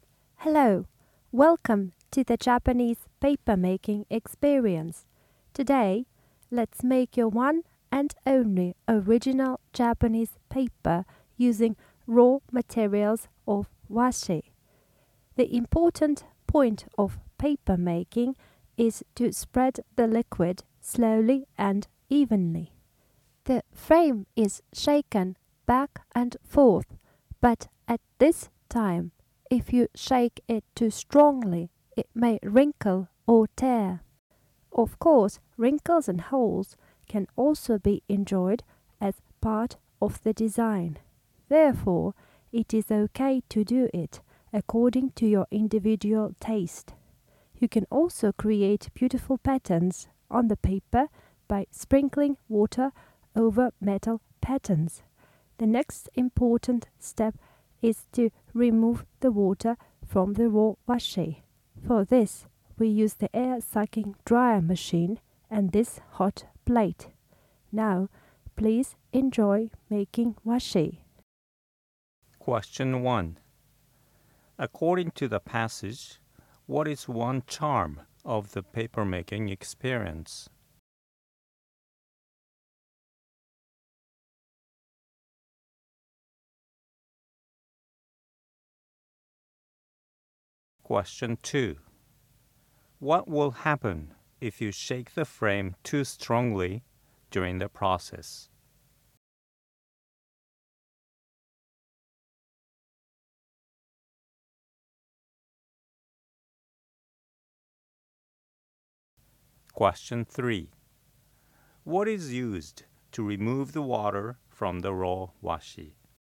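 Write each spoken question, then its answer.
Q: What will happen if you shake the frame too strongly during the process?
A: The paper may wrinkle or tear

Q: What is used to remove the water from the raw washi?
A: An air-sucking dryer machine and a hot plate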